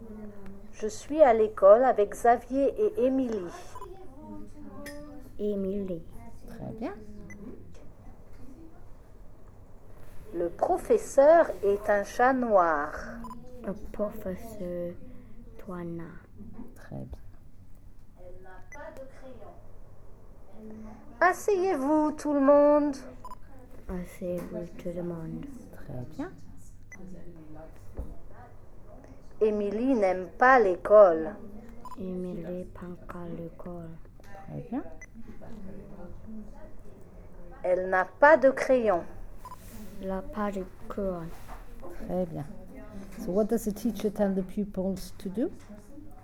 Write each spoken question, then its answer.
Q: So what does the teacher tell the pupils to do?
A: Come and sit down.